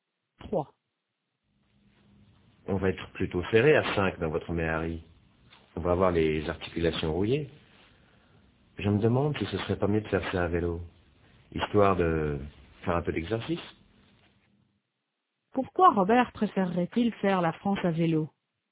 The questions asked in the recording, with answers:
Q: Pourquoi Robert préférerait-il faire la France à vélo?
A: Pour faire un peu d'exercice.